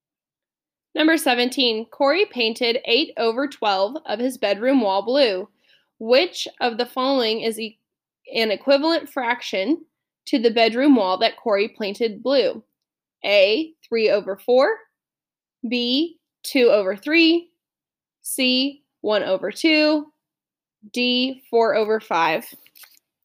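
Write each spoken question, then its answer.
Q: Which of the following is an equivalent fraction to the bedroom wall that Corey painted blue?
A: B: 2 over 3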